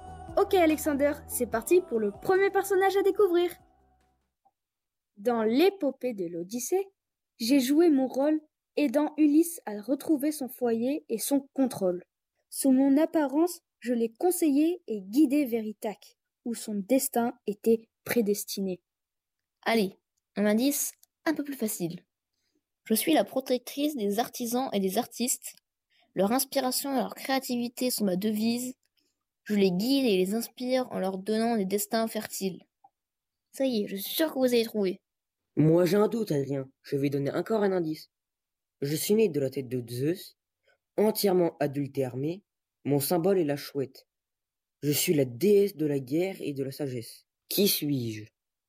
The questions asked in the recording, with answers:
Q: Qui suis-je?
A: Je suis Athéna, déesse aux multiples talents, protectrice des héros et des artisans.